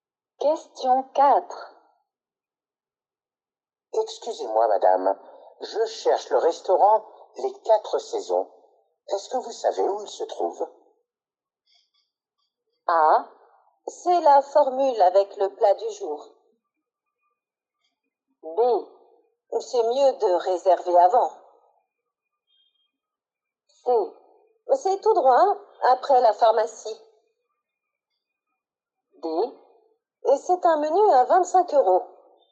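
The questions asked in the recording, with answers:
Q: Est-ce que vous savez où il se trouve?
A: C: C'est tout droit après la pharmacie.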